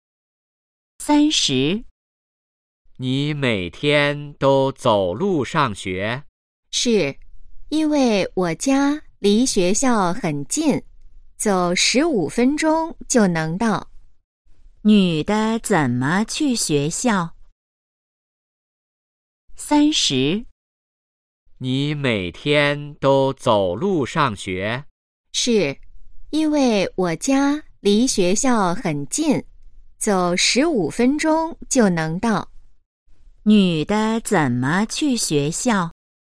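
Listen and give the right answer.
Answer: 走路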